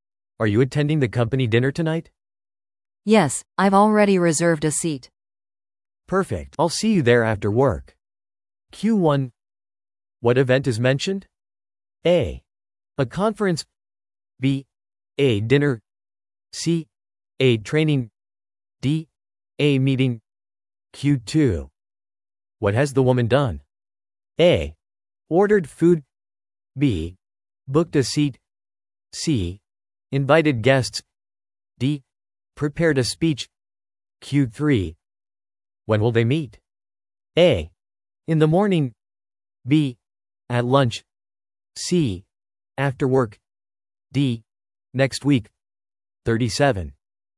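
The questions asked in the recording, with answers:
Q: What event is mentioned?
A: B: A dinner.

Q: What has the woman done?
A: B: Booked a seat.

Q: When will they meet?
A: C: After work.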